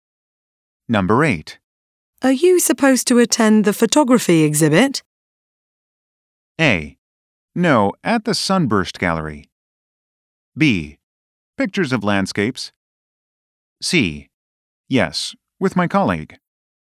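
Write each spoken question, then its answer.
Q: Are you supposed to attend the photography exhibit?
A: C: Yes, with my colleague.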